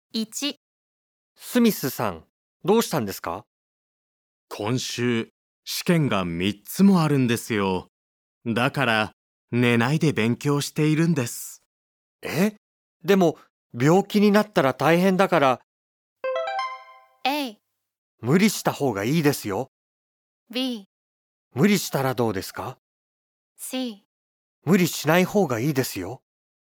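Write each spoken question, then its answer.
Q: え?でも、病気になったら大変だから。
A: C: 無理しない方がいいですよ。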